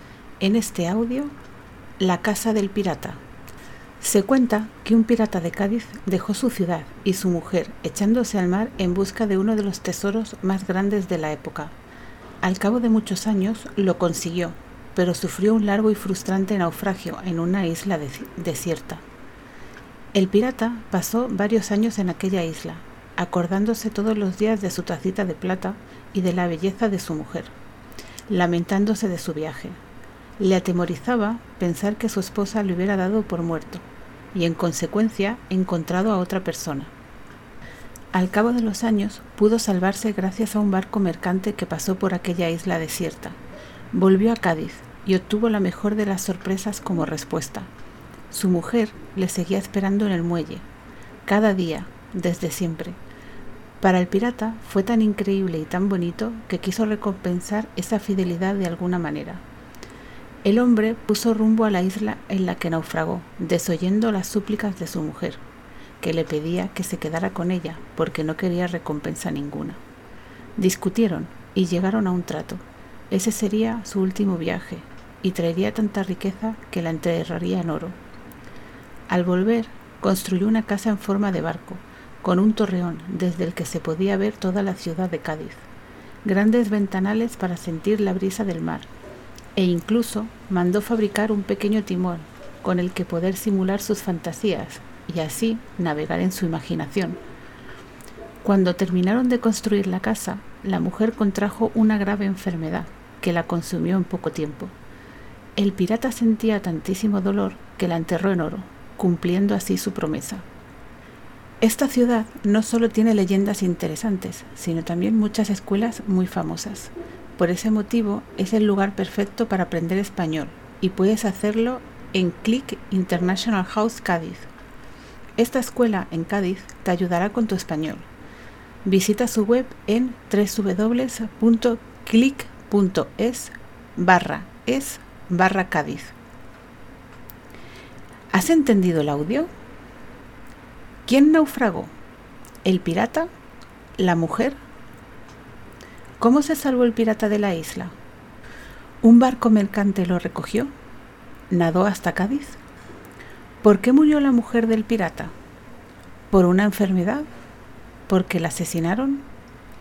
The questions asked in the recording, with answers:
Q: ¿Quién naufragó?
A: La respuesta correcta es el pirata.